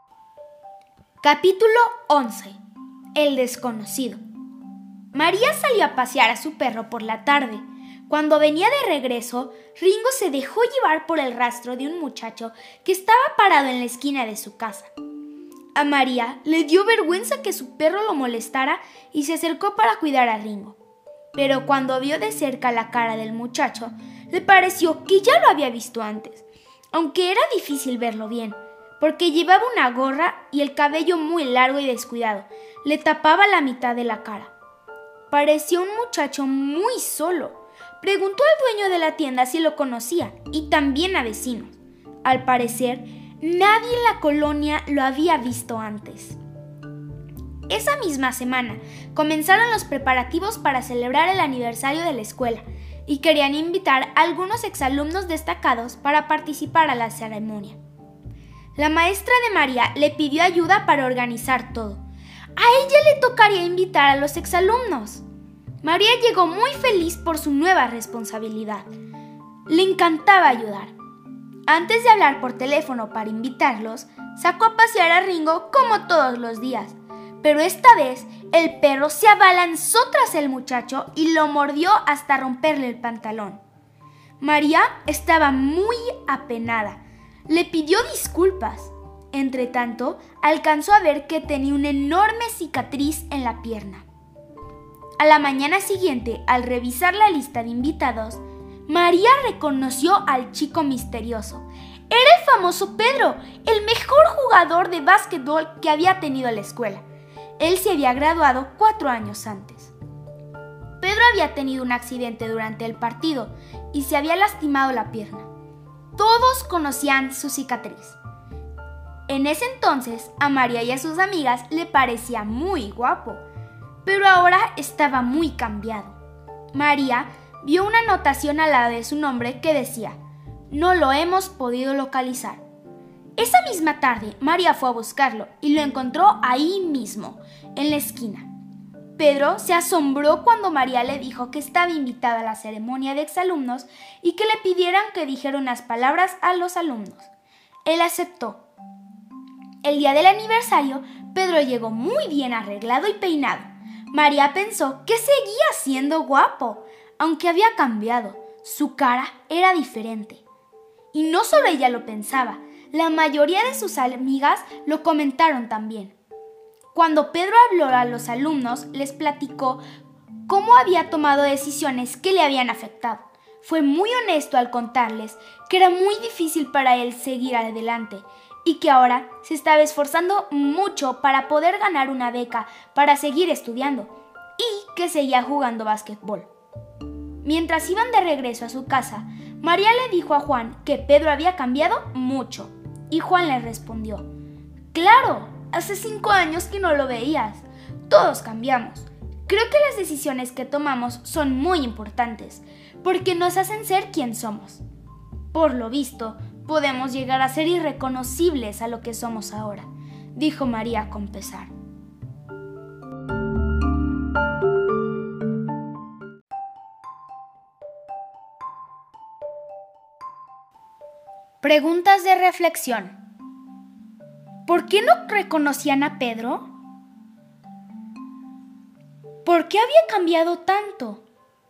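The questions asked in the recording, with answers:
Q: ¿Por qué no reconocían a Pedro?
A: Porque estaba muy cambiado: llevaba gorra y el cabello largo y descuidado que le tapaba la mitad de la cara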